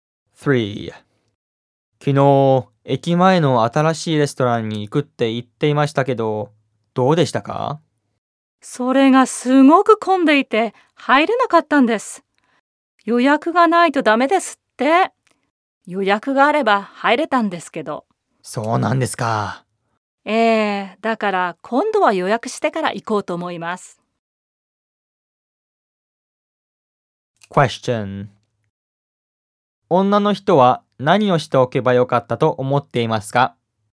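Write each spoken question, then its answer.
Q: 女の人は何をしておけばよかったと思っていますか?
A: レストランを予約しておけばよかった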